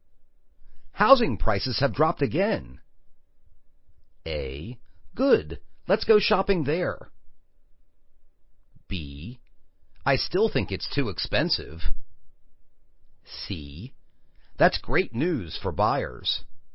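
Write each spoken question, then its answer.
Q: Housing prices have dropped again.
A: C: That's great news for buyers.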